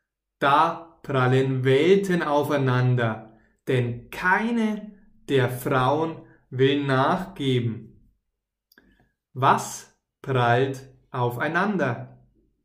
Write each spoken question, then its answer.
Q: Was prallt aufeinander?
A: Welten. Da prallen Welten aufeinander.